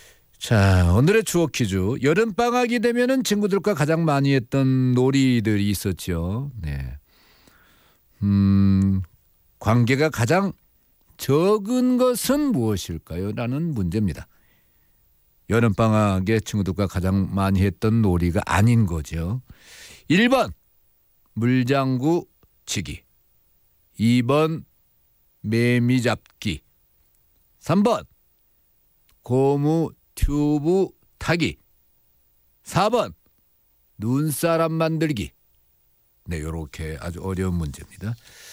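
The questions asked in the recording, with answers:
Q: 관계가 가장 적은 것은 무엇일까요?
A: 4: 눈사람 만들기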